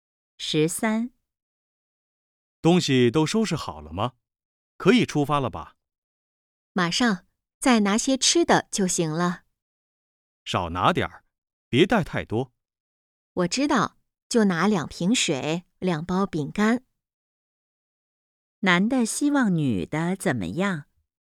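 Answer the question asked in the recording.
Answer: 少拿点儿东西,别带太多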